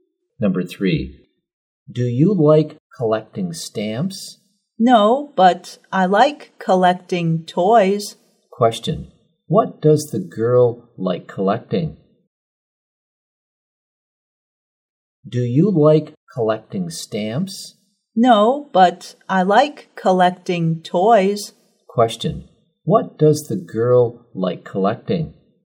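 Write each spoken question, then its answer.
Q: Question, what does the girl like collecting?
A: Toys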